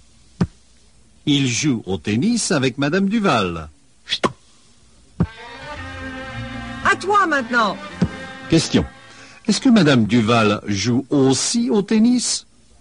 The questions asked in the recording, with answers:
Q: Est-ce que Madame Duval joue aussi au tennis?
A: Oui, Madame Duval joue aussi au tennis.